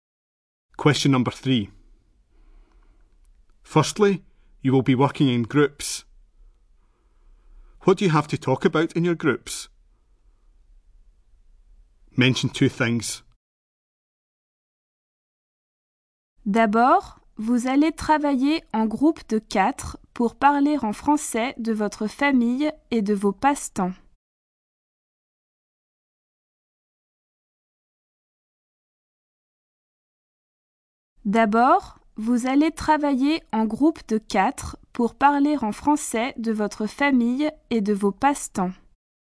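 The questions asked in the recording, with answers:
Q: What do you have to talk about in your groups?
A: Your family and your hobbies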